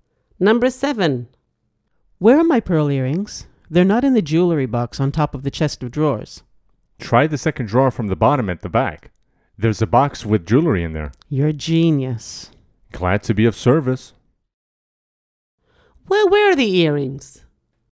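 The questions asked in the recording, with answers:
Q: Well, where are the earrings?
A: In a box at the back of the second drawer from the bottom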